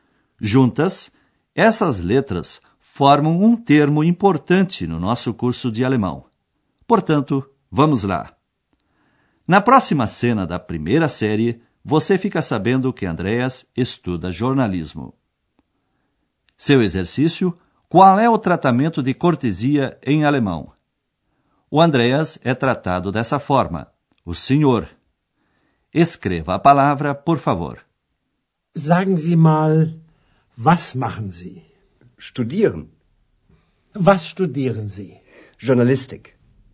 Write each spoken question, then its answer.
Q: qual é o tratamento de cortesia em alemão?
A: Essa palavra é zi, com letra S maiúscula.